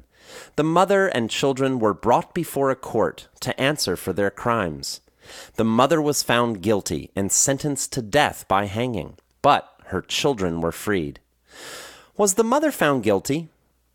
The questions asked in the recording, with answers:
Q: Was the mother found guilty?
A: Yes, she was. The mother was found guilty and sentenced to death by hanging.